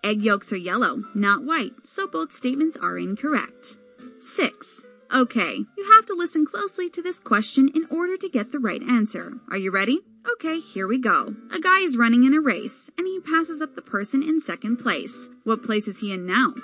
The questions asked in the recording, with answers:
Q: What place is he in now?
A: The answer is he would be in 2nd place, of course.